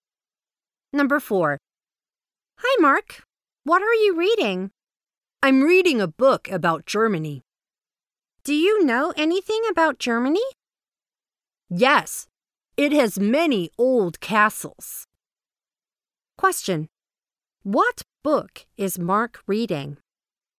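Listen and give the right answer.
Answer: A book about Germany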